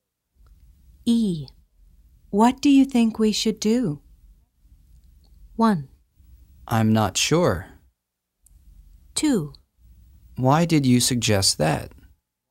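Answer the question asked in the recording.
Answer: 1: I'm not sure.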